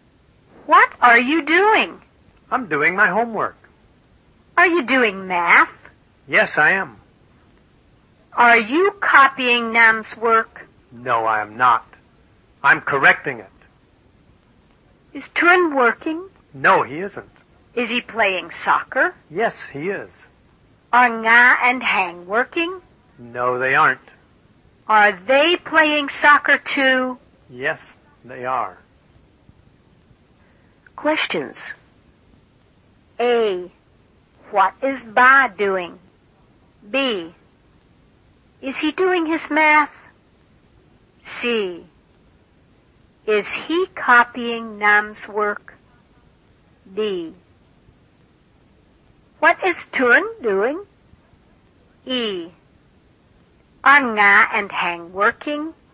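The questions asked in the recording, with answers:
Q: Is he doing his math?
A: Yes, he is.

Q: Is he copying Nam's work?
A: No, he isn't. He's correcting it.

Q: What is Turin doing?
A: He is playing soccer.

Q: Are Nga and Hang working?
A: No, they aren't.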